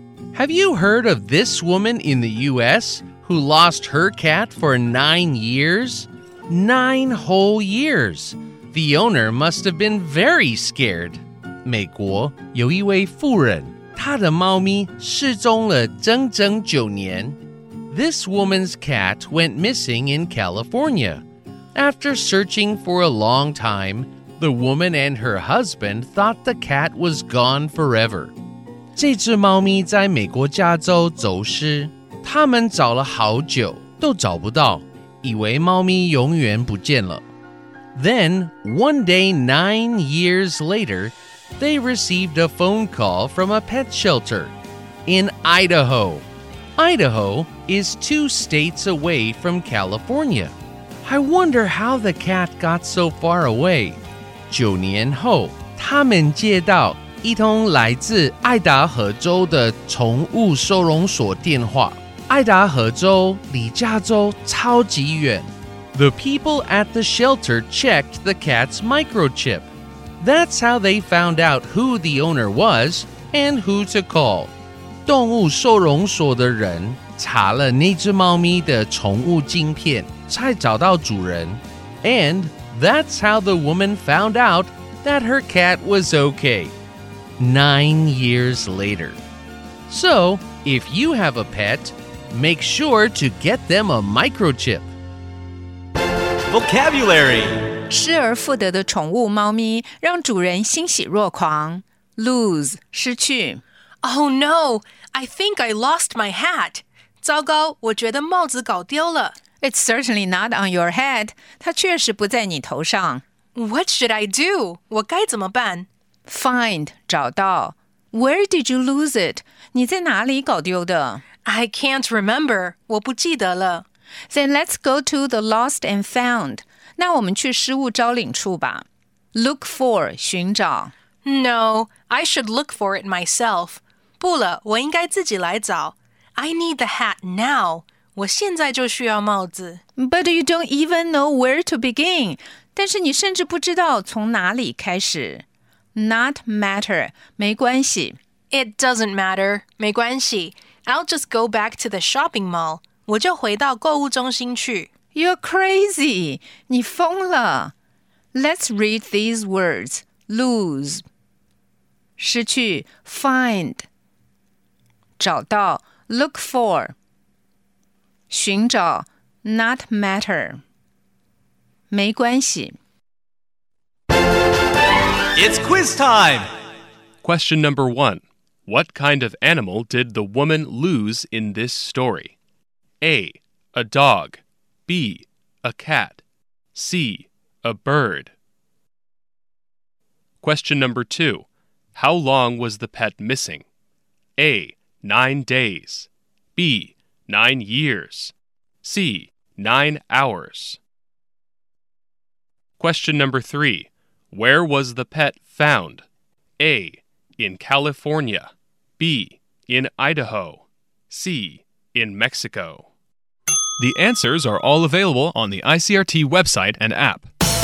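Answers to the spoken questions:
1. B: A cat.
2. B: Nine years.
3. B: In Idaho.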